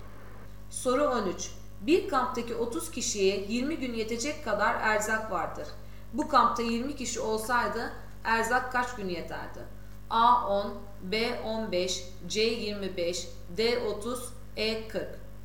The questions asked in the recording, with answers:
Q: Bu kampta 20 kişi olsaydı erzak kaç gün yeterdi?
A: Doğru cevap D 30.